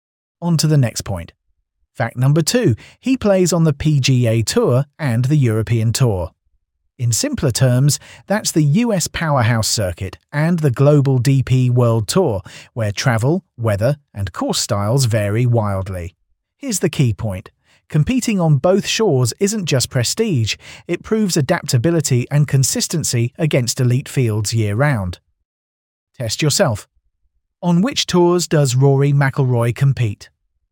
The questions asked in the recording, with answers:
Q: On which tours does Rory McIlroy compete?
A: Correct answer, PGA Tour and European Tour.